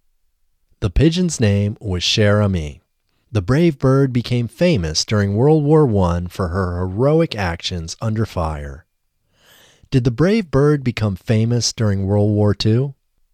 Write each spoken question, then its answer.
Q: Did the brave bird become famous during World War II?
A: No, the brave bird didn't become famous during World War II.